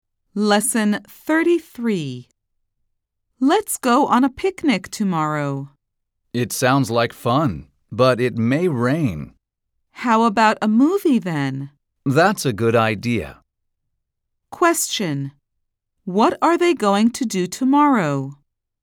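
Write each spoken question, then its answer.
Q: What are they going to do tomorrow?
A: See a movie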